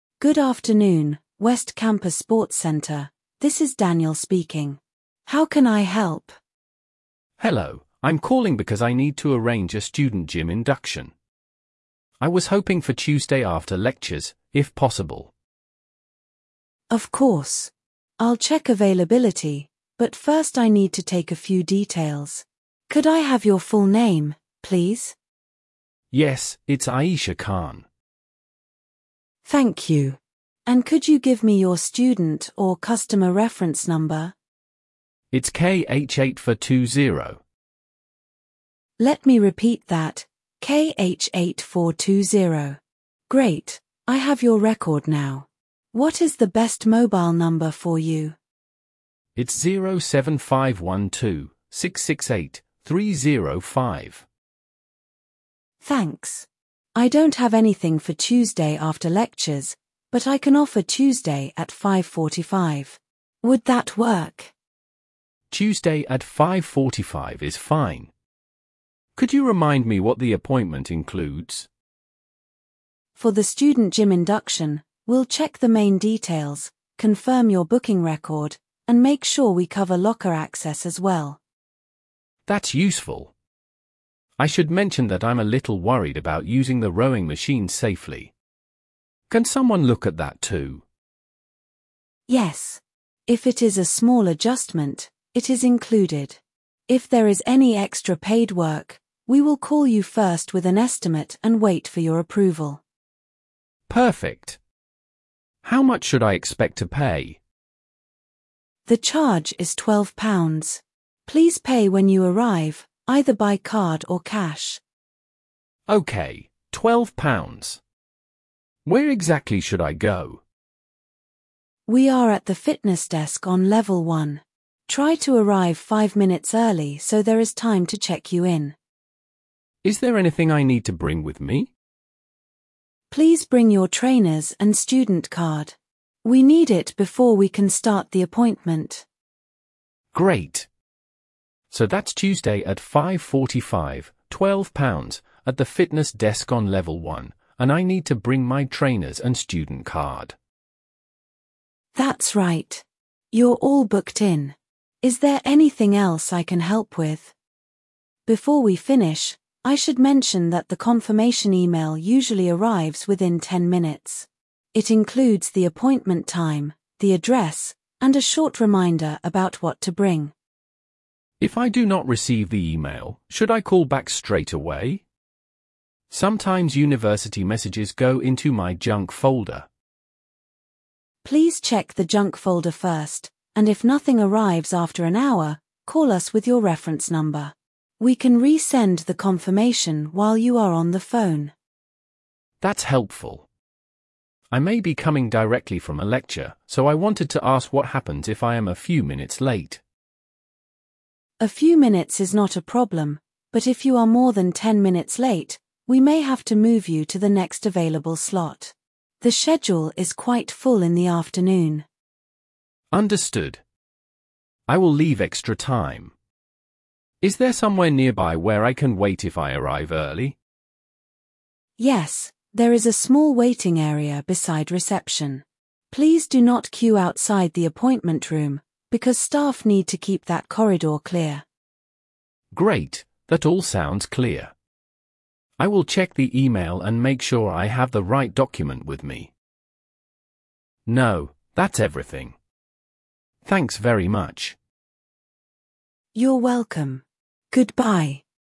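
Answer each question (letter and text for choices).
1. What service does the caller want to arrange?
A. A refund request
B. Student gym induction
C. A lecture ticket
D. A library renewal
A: B. Student gym induction

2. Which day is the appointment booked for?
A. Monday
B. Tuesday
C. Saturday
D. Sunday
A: B. Tuesday

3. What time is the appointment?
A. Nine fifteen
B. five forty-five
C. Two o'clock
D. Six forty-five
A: B. five forty-five

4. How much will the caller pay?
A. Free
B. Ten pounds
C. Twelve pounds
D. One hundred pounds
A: C. Twelve pounds

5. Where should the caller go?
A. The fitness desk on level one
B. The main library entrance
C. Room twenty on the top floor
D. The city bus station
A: A. The fitness desk on level one

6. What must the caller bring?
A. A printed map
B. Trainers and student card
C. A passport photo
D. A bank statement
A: B. Trainers and student card

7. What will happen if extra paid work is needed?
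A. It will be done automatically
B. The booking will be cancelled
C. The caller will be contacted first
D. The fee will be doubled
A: C. The caller will be contacted first

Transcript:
Staff: Good afternoon, West Campus Sports Centre, this is Daniel speaking. How can I help?
Student: Hello, I'm calling because I need to arrange a student gym induction. I was hoping for Tuesday after lectures, if possible.
Staff: Of course. I'll check availability, but first I need to take a few details. Could I have your full name, please?
Student: Yes, it's Aisha Khan.
Staff: Thank you. And could you give me your student or customer reference number?
Great, I have your record now. What is the best mobile number for you?
Staff: Thanks. I don't have anything for Tuesday after lectures, but I can offer Tuesday at five forty-five. Would that work?
Could you remind me what the appointment includes?
Staff: For the student gym induction, we'll check the main details, confirm your booking record, and make sure we cover locker access as well.
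Student: That's useful. I should mention that I'm a little worried about using the rowing machines safely. Can someone look at that too?
Staff: Yes. If it is a small adjustment, it is included. If there is any extra paid work, we will call you first with an estimate and wait for your approval.
Student: Perfect. How much should I expect to pay?
Staff: The charge is twelve pounds. Please pay when you arrive, either by card or cash.
Student: Okay, twelve pounds. Where exactly should I go?
Staff: We are at the fitness desk on level one. Try to arrive five minutes early so there is time to check you in.
Student: Is there anything I need to bring with me?
Staff: Please bring your trainers and student card.
So that's Tuesday at five forty-five, twelve pounds, at the fitness desk on level one, and I need to bring my trainers and student card.
Staff: That's right. You're all booked in. Is there anything else I can help with?
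Staff: Before we finish, I should mention that the confirmation email usually arrives within ten minutes. It includes the appointment time, the address, and a short reminder about what to bring.
Student: If I do not receive the email, should I call back straight away? Sometimes university messages go into my junk folder.
Staff: Please check the junk folder first, and if nothing arrives after an hour, call us with your reference number. We can resend the confirmation while you are on the phone.
Student: That's helpful. I may be coming directly from a lecture, so I wanted to ask what happens if I am a few minutes late.
Staff: A few minutes is not a problem, but if you are more than ten minutes late, we may have to move you to the next available slot. The schedule is quite full in the afternoon.
Student: Understood. I will leave extra time. Is there somewhere nearby where I can wait if I arrive early?
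Staff: Yes, there is a small waiting area beside reception. Please do not queue outside the appointment room, because staff need to keep that corridor clear.
Student: Great, that all sounds clear. I will check the email and make sure I have the right document with me.
Student: No, that's everything. Thanks very much.
Staff: You're welcome. Goodbye.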